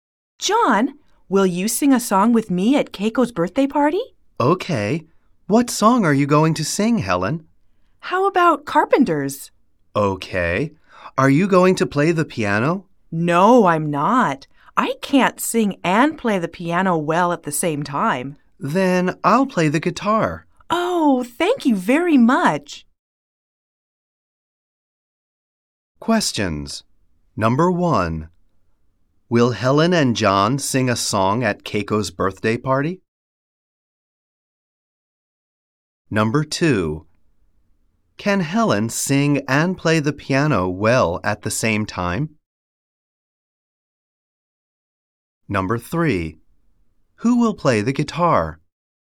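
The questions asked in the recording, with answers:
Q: Will Helen and John sing a song at Keiko's birthday party?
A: Yes, they will.

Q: Can Helen sing and play the piano well at the same time?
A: No, she can't.

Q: Who will play the guitar?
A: John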